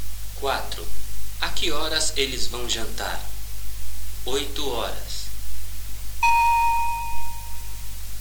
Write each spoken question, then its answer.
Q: A que horas eles vão jantar?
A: Eles vão jantar às 8:00.